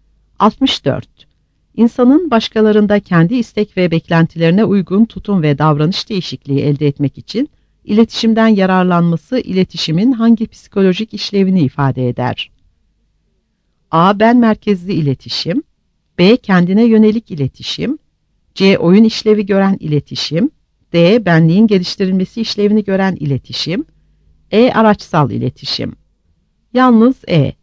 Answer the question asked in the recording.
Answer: Yalnız E.